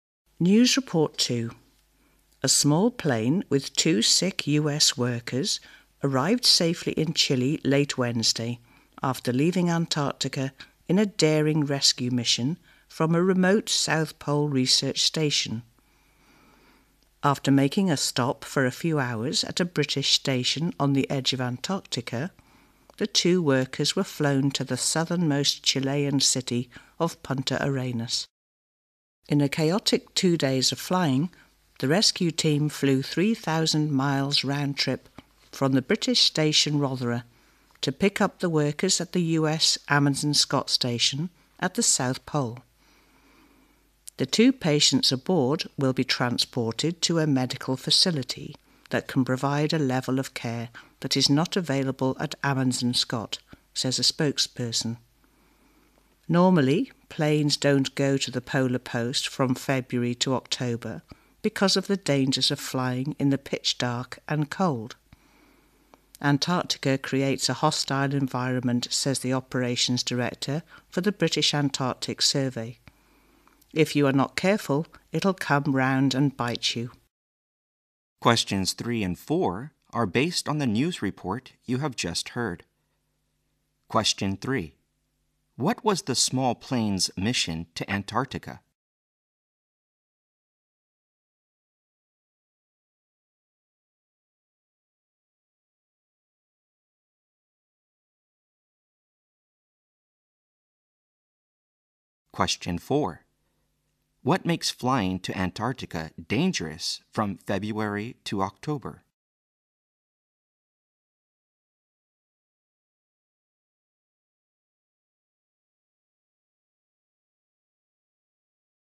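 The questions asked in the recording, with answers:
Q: What was the small plane's mission to Antarctica?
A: To rescue two sick US workers from the South Pole research station

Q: What makes flying to Antarctica dangerous from February to October?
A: The pitch dark and the cold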